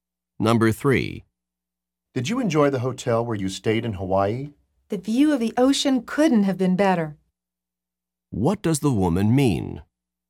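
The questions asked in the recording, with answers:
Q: What does the woman mean?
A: The hotel's ocean view was excellent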